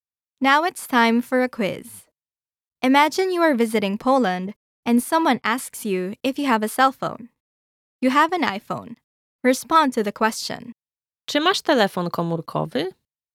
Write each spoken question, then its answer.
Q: Czy masz telefon komórkowy?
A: Tak, mam iPhone'a.